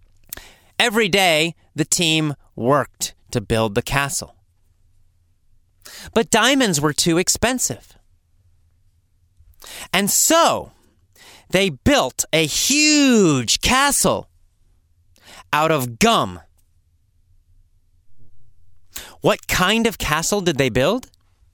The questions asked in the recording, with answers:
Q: What kind of castle did they build?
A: They built a gum castle.